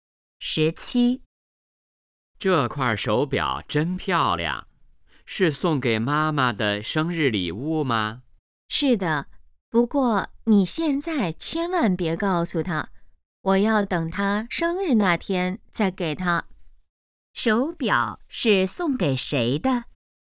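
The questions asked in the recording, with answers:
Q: 手表是送给谁的?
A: 妈妈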